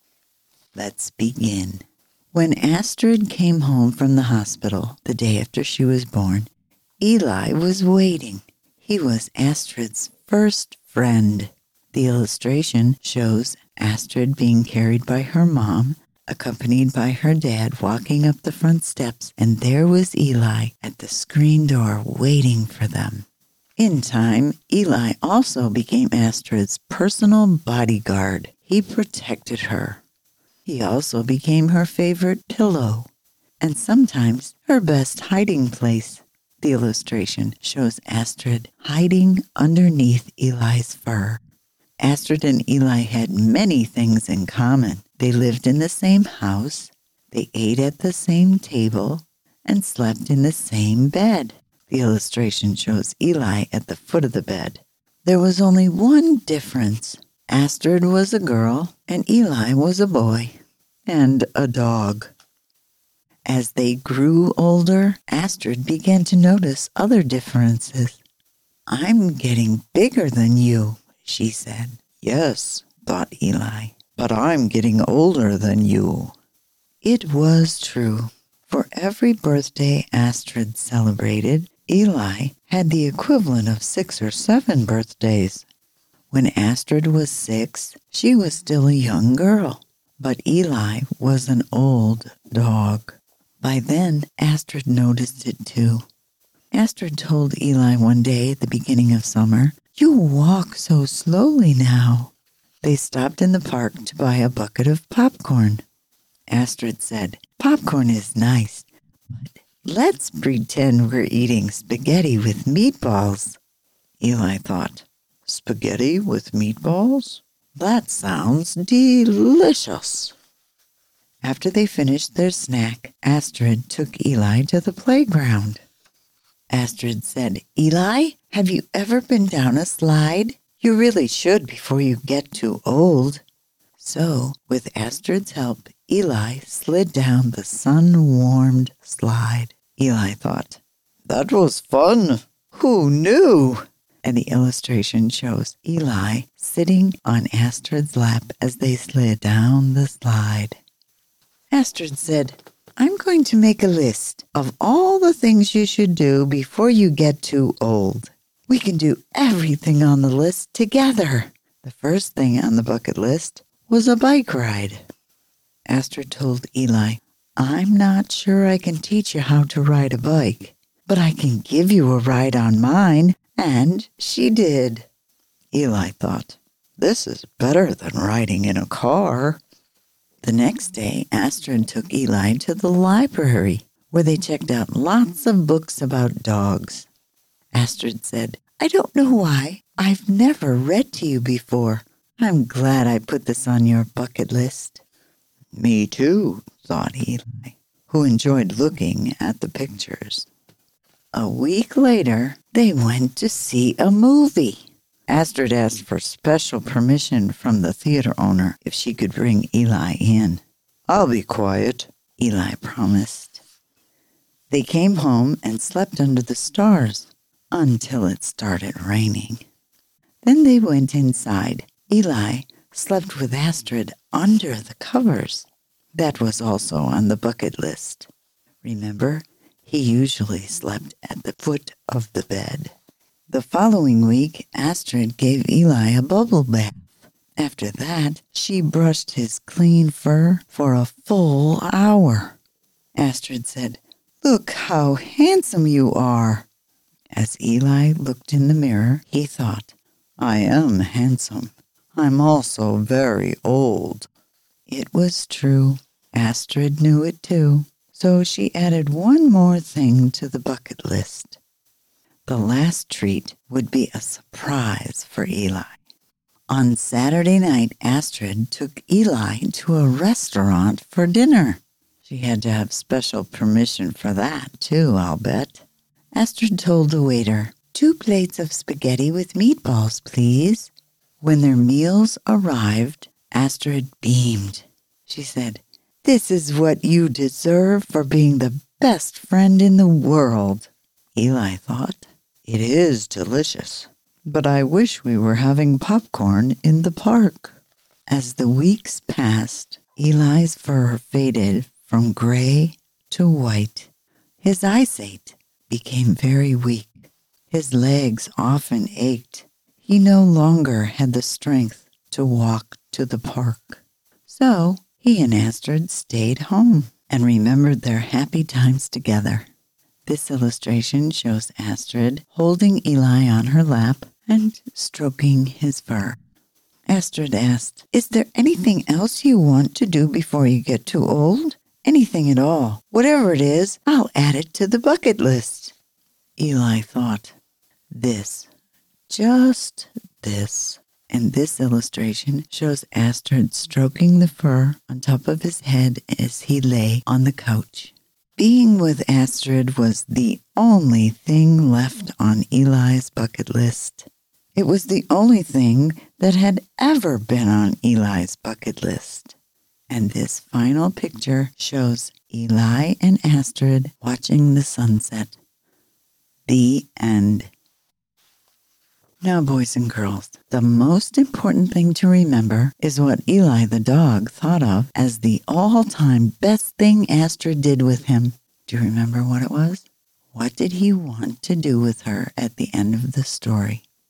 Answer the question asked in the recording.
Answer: Yes, he really treasured just being with Astrid the most.